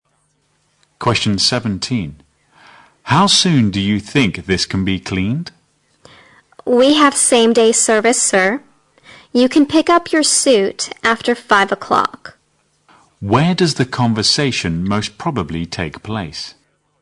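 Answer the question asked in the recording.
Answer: At a dry cleaner's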